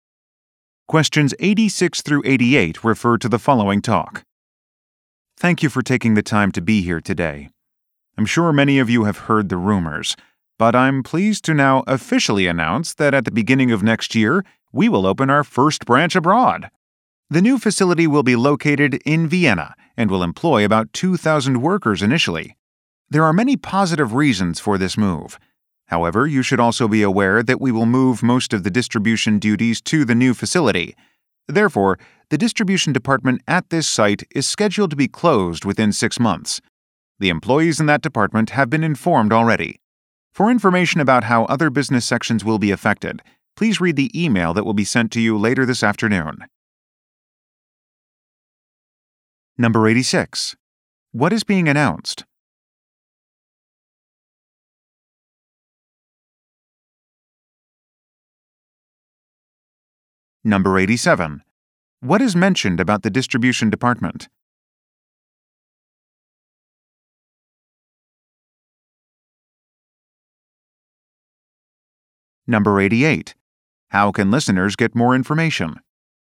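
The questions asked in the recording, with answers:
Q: What is being announced?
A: The opening of the company's first branch abroad, in Vienna

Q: What is mentioned about the distribution department?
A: It will close within 6 months

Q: How can listeners get more information?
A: By reading an email sent later this afternoon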